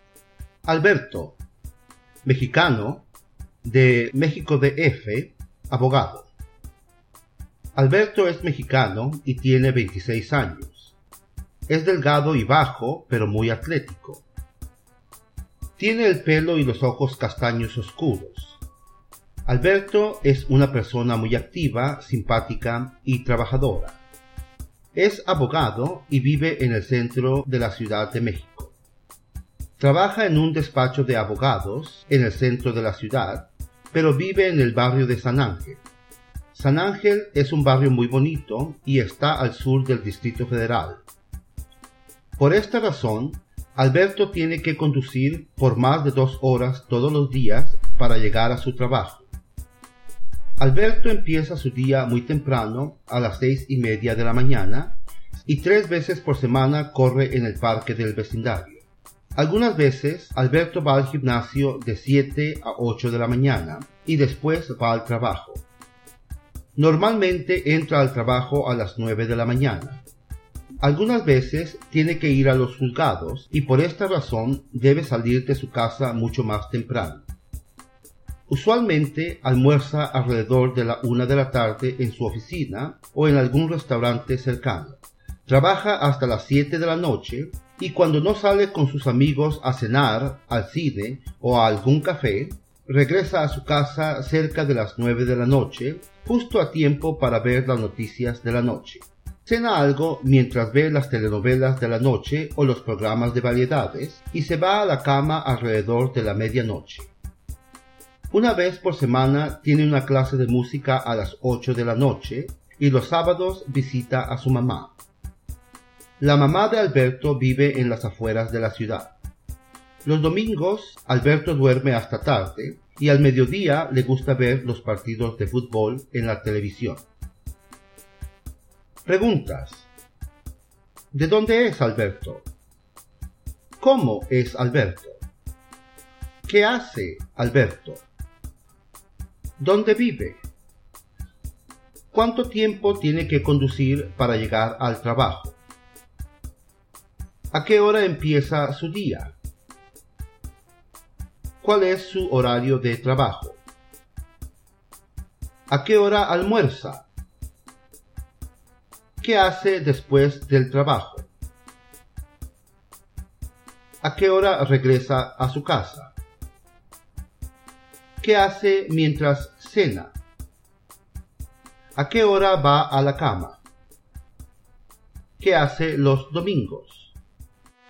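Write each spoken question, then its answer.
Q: ¿De dónde es Alberto?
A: De México DF, es mexicano

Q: ¿Cómo es Alberto?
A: Delgado, bajo y atlético; activo, simpático y trabajador

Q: ¿Qué hace Alberto?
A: Es abogado

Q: ¿Cuánto tiempo tiene que conducir para llegar al trabajo?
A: Más de 2 horas todos los días

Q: ¿A qué hora empieza su día?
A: A las 6:30 de la mañana

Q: ¿Cuál es su horario de trabajo?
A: De las 9 de la mañana a las 7 de la noche

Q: ¿A qué hora almuerza?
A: Alrededor de la 1 de la tarde

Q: ¿Qué hace después del trabajo?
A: Sale con sus amigos a cenar, al cine o a algún café, o regresa a casa

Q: ¿A qué hora regresa a su casa?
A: Cerca de las 9 de la noche

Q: ¿Qué hace mientras cena?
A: Ve las telenovelas o los programas de variedades

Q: ¿A qué hora va a la cama?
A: Alrededor de la medianoche

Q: ¿Qué hace los domingos?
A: Duerme hasta tarde y al mediodía ve partidos de fútbol en la televisión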